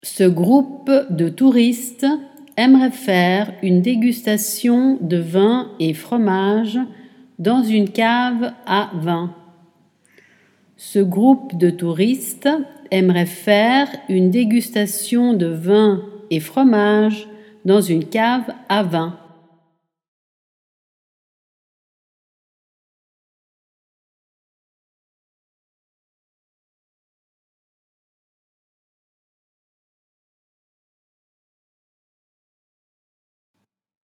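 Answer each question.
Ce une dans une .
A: groupe de touristes aimerait faire / dégustation de vin et fromage / cave à vin

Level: Dettato di francese A2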